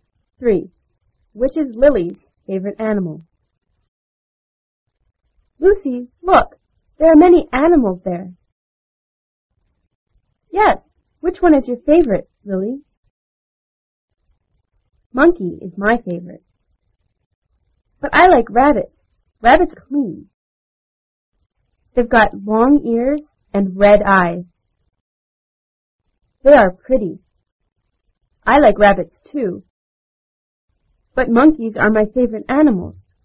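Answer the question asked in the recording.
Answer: Monkey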